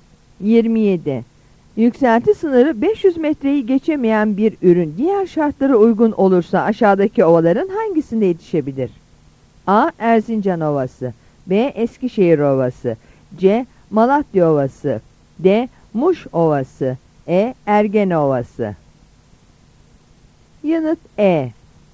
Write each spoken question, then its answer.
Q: Yükselti sınırı 500 metreyi geçemeyen bir ürün diğer şartlara uygun olursa aşağıdaki ovaların hangisinde yetişebilir?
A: Yanıt E.